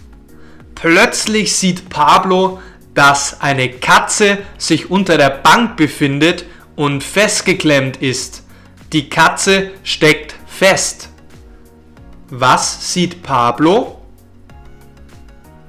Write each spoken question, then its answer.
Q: Was sieht Pablo?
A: Er sieht, dass sich eine Katze unter der Bank befindet und festgeklemmt ist.